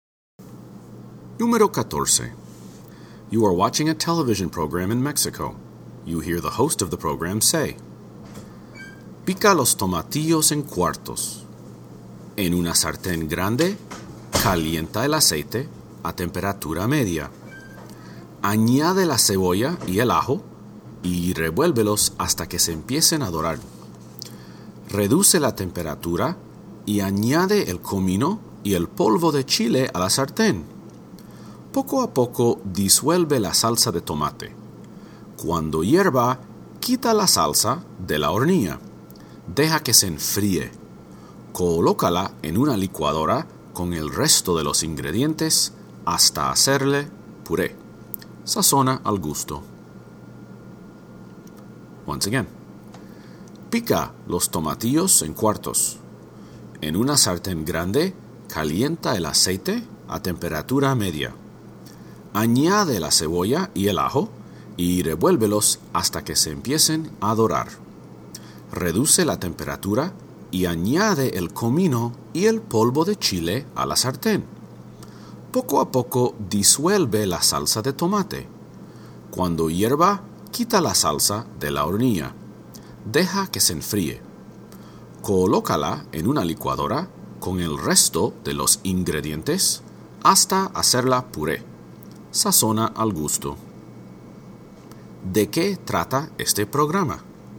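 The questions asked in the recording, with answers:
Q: ¿De qué trata este programa?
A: De cómo preparar una salsa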